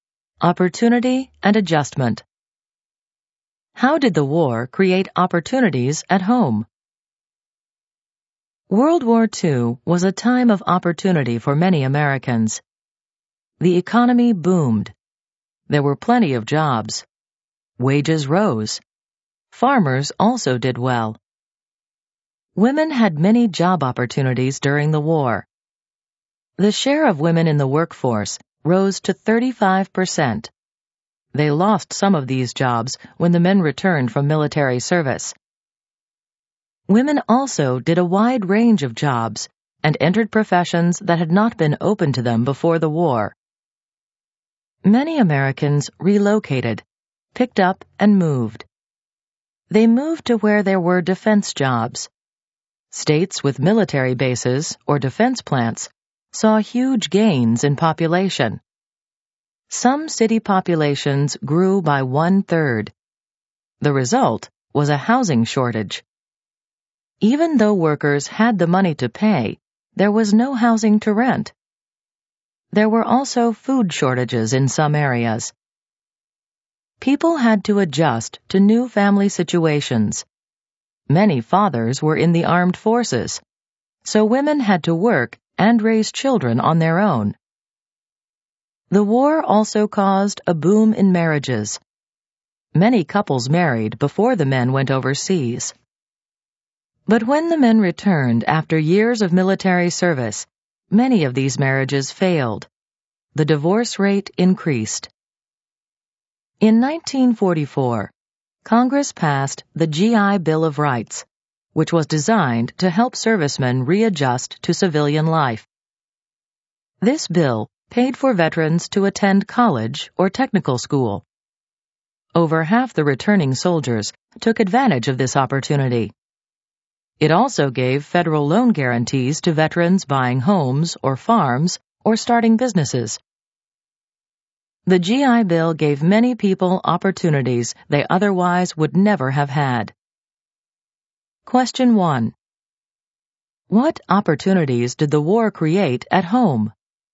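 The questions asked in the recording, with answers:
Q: What opportunities did the war create at home?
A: Plenty of jobs with rising wages, new jobs and professions for women, and GI Bill benefits for veterans (education and loans)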